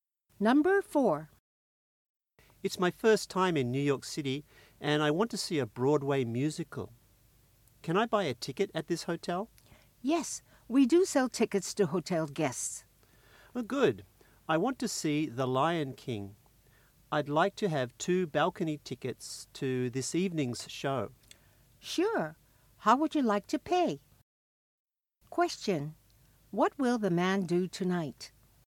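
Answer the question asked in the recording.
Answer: See The Lion King musical on Broadway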